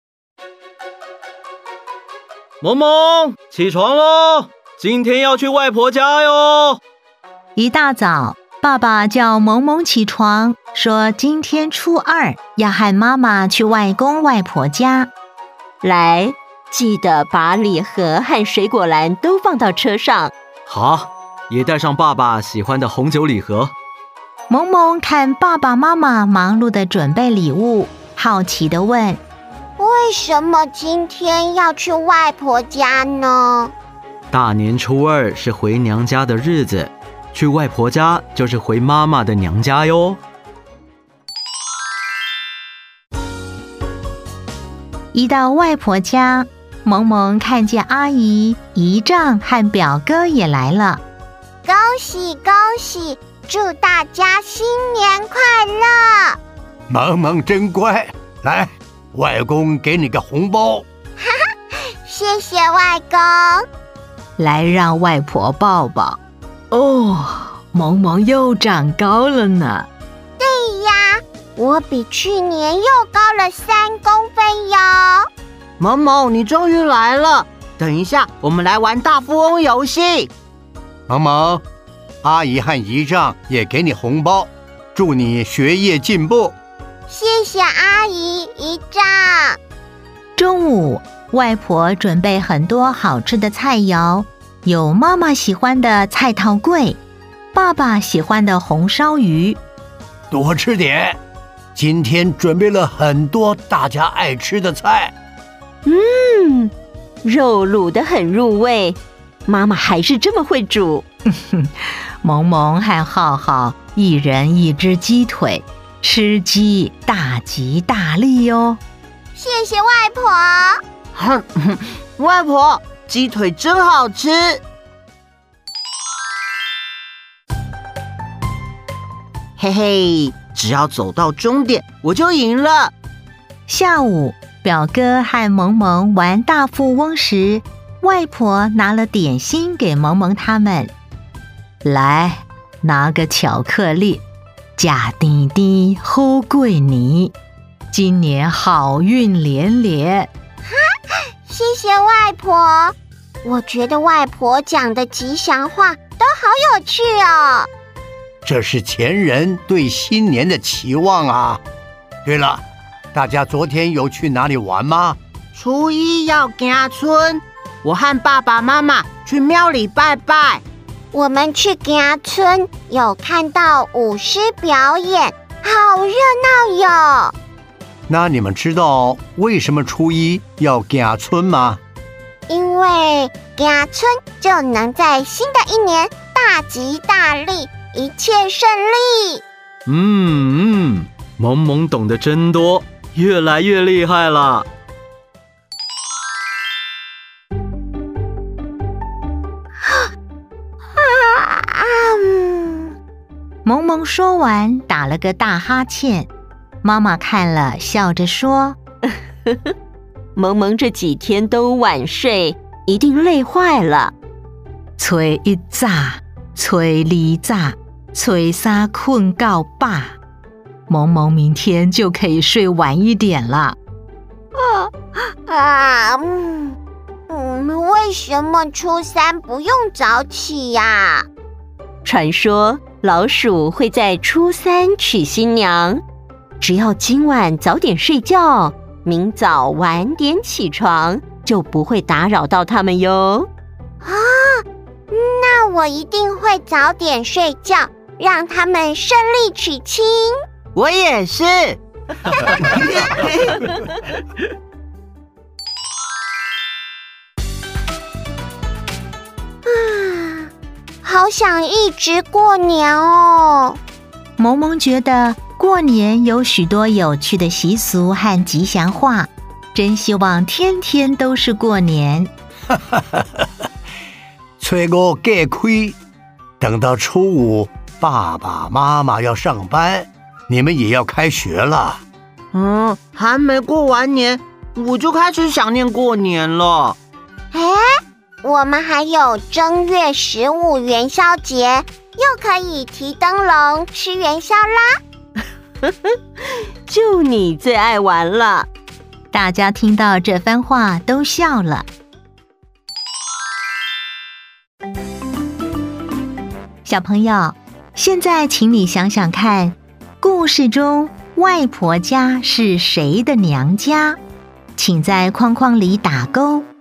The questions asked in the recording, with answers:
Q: 故事中外婆家是谁的娘家?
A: 妈妈。